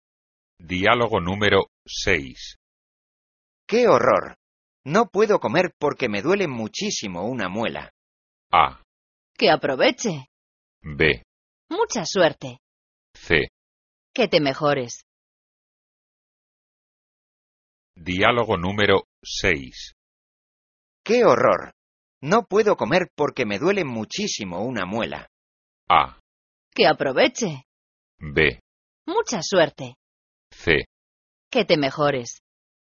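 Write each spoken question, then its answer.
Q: ¡Qué horror! No puedo comer porque me duele muchísimo una muela.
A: C: Que te mejores.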